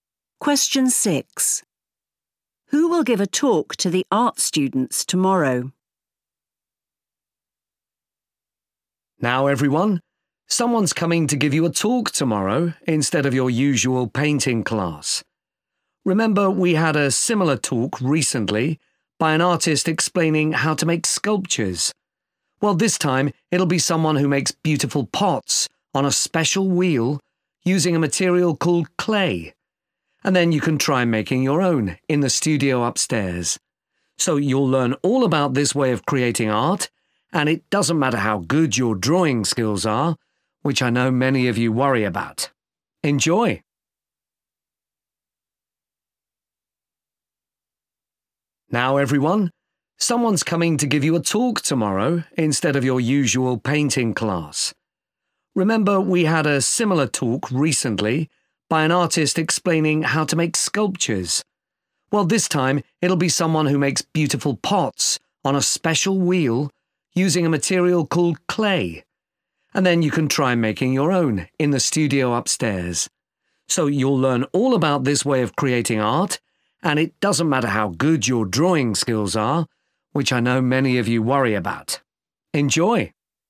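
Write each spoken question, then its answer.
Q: Who will give a talk to the art students tomorrow?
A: someone who makes pots from clay (a potter)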